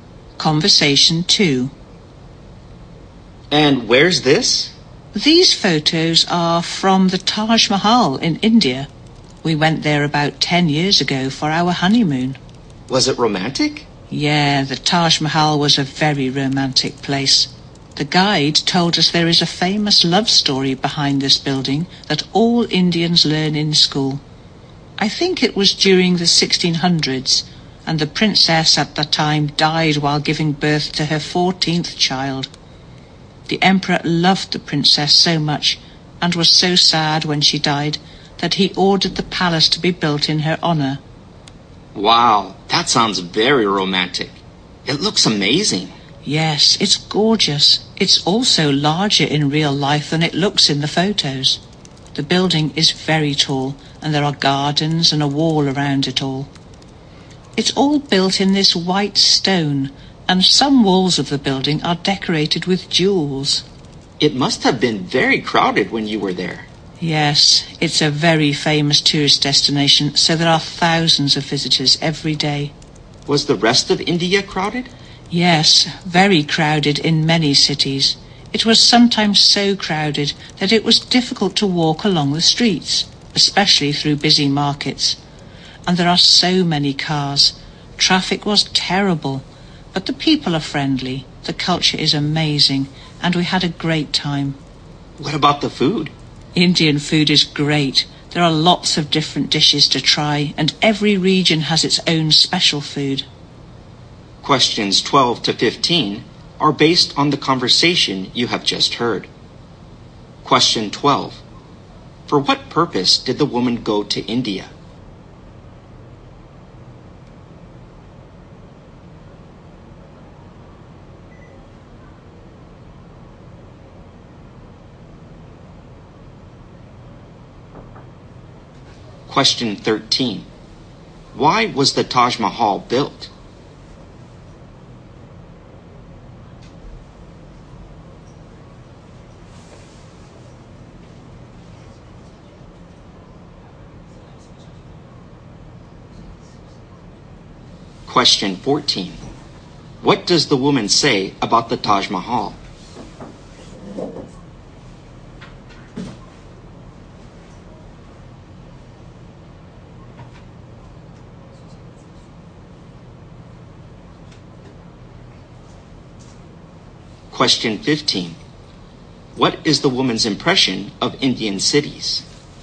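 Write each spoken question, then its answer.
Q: For what purpose did the woman go to India?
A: Her honeymoon

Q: Why was the Taj Mahal built?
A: To honor the emperor's beloved princess, who had died

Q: What is the woman's impression of Indian cities?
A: They are very crowded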